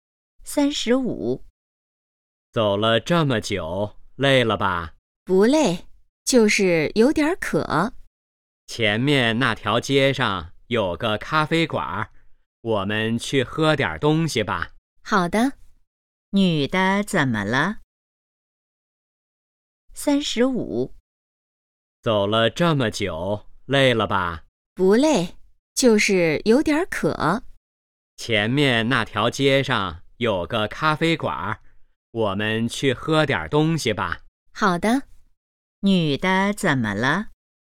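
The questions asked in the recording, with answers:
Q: 女的怎么了?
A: 有点渴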